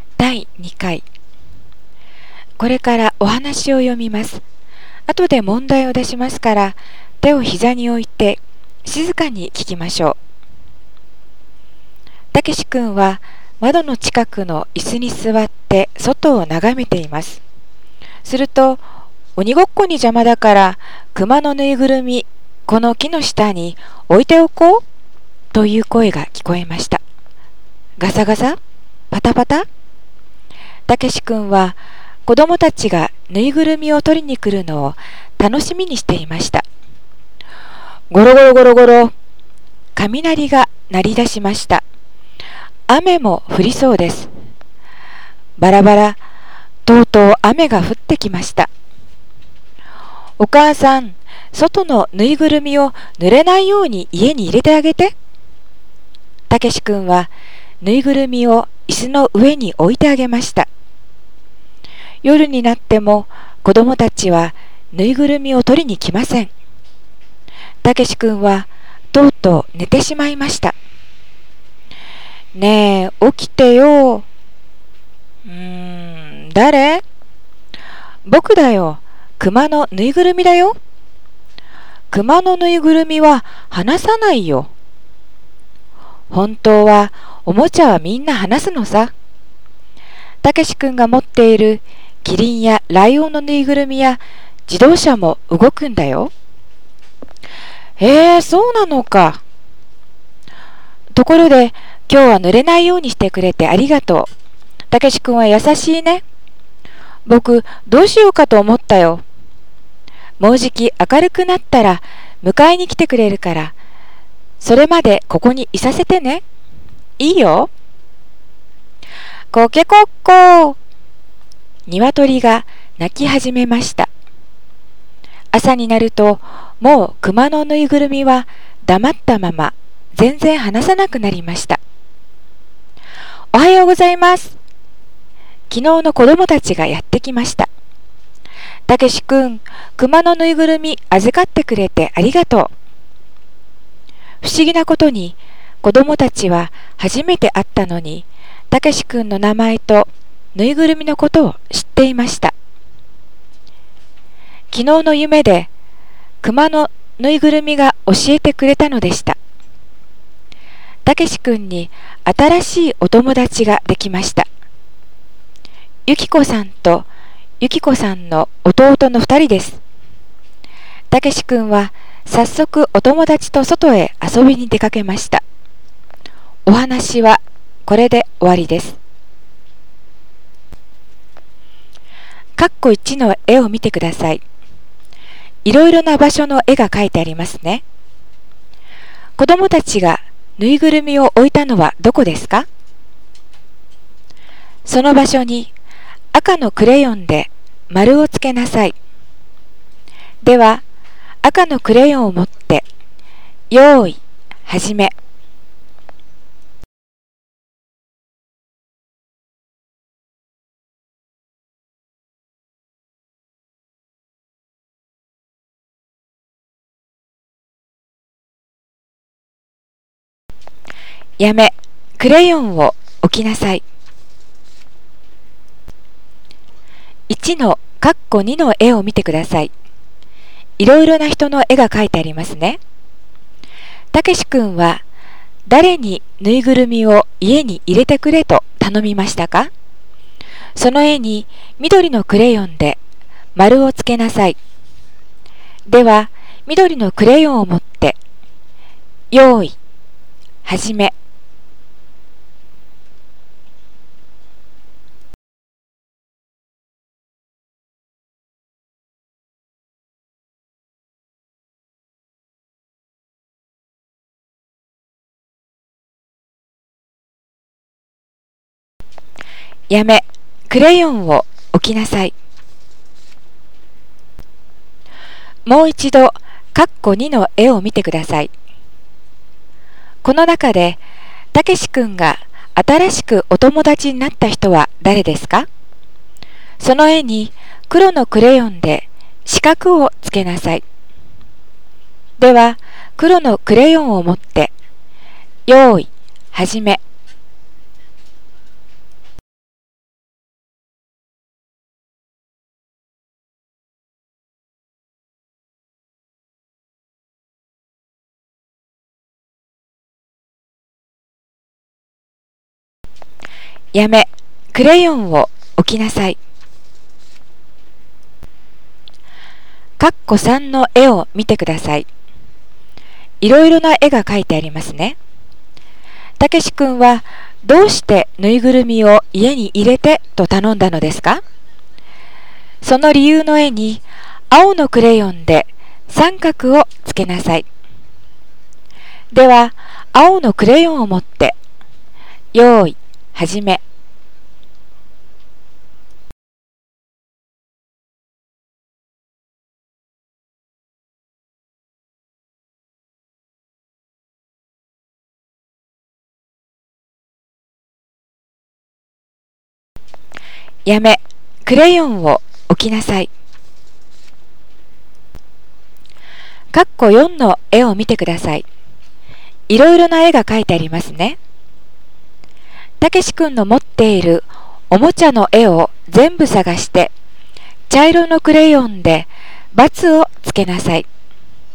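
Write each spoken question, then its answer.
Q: 子供たちがぬいぐるみを置いたのはどこですか?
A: 木の下

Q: たけし君は誰にぬいぐるみを家に入れてくれと頼みましたか?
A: お母さん

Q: この中で、たけし君が新しくお友達になった人は誰ですか?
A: ゆきこさんとゆきこさんの弟

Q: たけし君はどうしてぬいぐるみを家に入れてと頼んだのですか。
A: 雨が降ってきて、ぬいぐるみが濡れないように

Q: たけし君の持っているおもちゃの絵を全部探して、茶色のクレヨンで×をつけなさい。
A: キリンのぬいぐるみ、ライオンのぬいぐるみ、自動車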